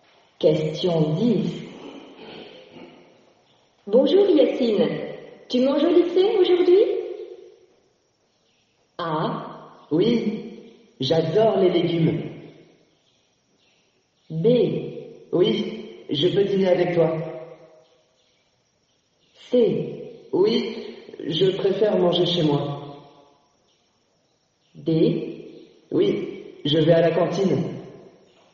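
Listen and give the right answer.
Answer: D: Oui, je vais à la cantine.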